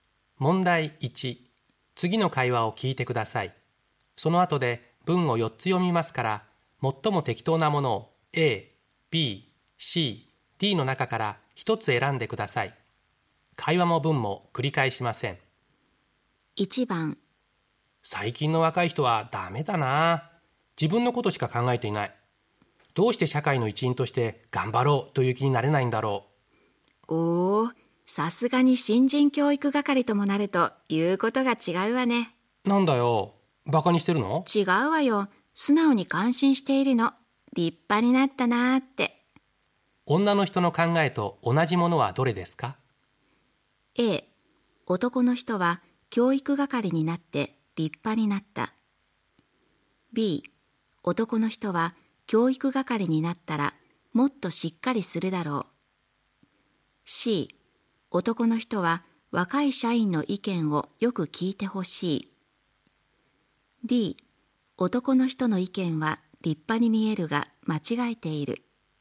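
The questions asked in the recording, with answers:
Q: 女の人の考えと同じものはどれですか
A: A: 男の人は教育係になって立派になった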